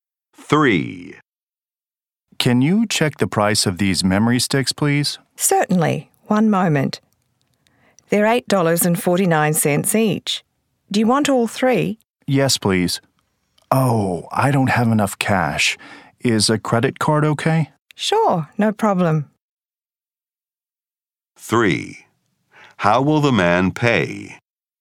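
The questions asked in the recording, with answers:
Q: How will the man pay?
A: By credit card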